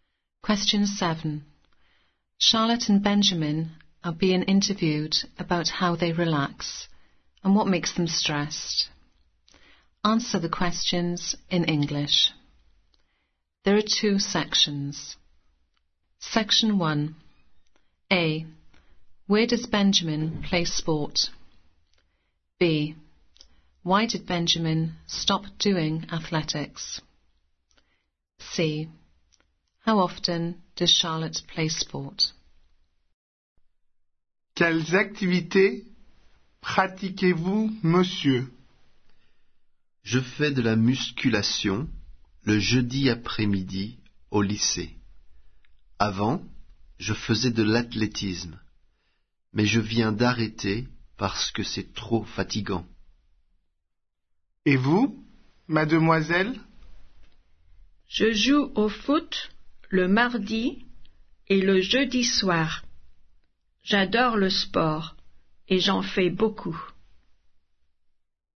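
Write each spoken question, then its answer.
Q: Where does Benjamin play sport?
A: at school (lycée)

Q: Why did Benjamin stop doing athletics?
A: it was too tiring

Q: How often does Charlotte play sport?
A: twice a week (Tuesday and Thursday evenings)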